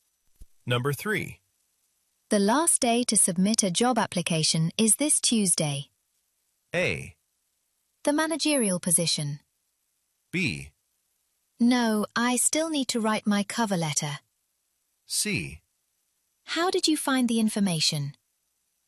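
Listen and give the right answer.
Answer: B: No, I still need to write my cover letter.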